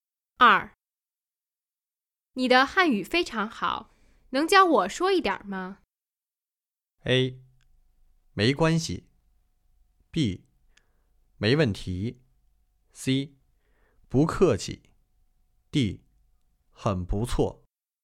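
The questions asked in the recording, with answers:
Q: 你的汉语非常好,能教我说一点吗?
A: B: 没问题。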